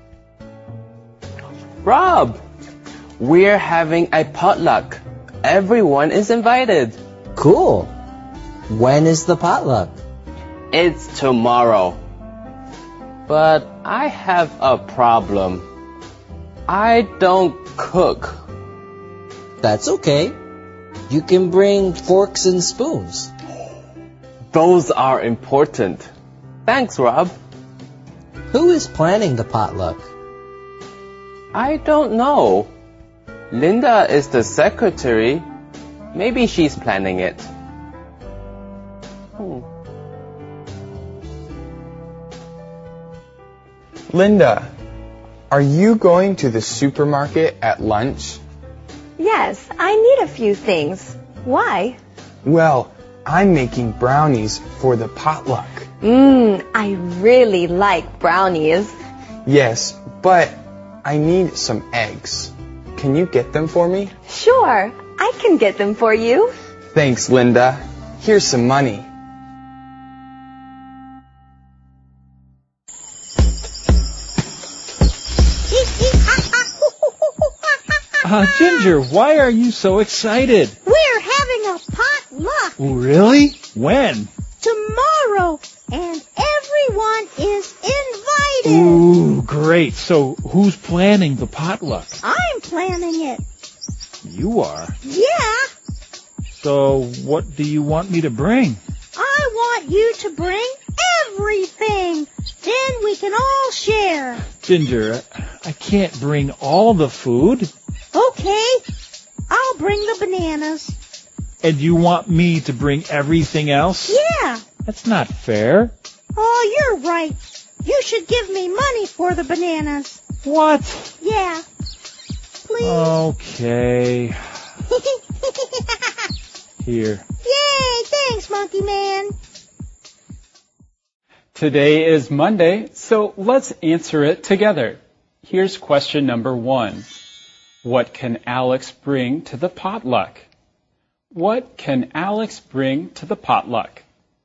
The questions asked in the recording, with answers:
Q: What can Alex bring to the potluck?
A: He can bring forks and spoons to the potluck.